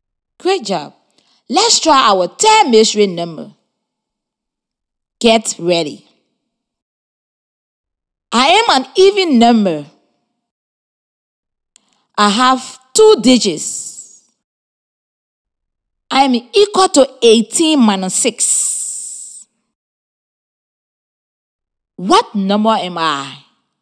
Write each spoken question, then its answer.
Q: What number am I?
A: The mystery number is 12.